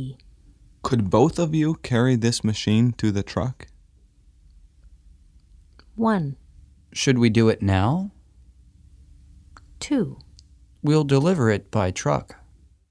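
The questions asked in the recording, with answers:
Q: Could both of you carry this machine to the truck?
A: 1: Should we do it now?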